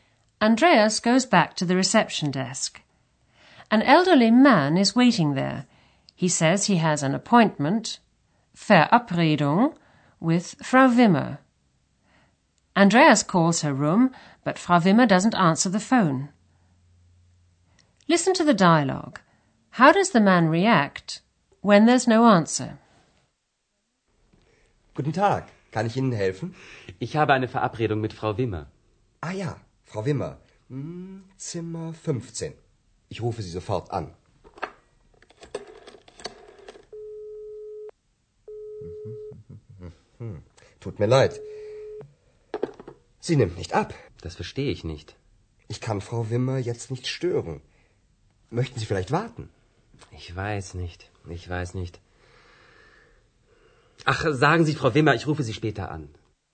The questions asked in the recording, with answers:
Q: How does the man react when there's no answer?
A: The man leaves a message for Frau Wimmer that he'll call her again later.